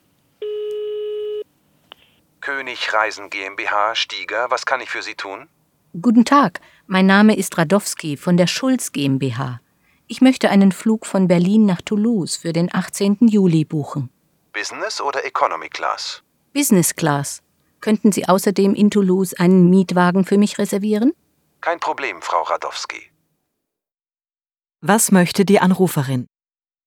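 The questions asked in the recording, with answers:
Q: Was möchte die Anruferin?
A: Einen Business-Class-Flug Berlin–Toulouse für den 18. Juli buchen und einen Mietwagen reservieren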